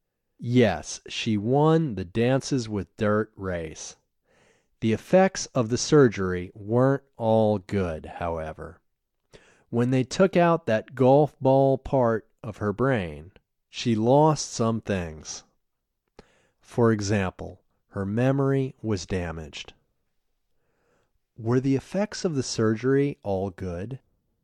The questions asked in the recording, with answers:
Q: Were the effects of the surgery all good?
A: No, the effects of the surgery weren't all good.